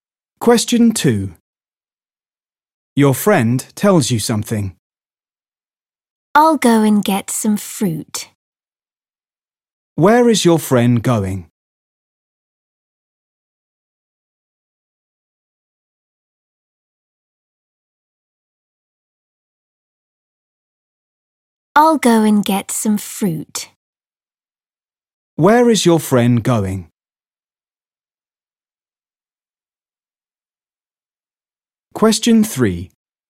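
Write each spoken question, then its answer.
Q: Where is your friend going?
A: to get some fruit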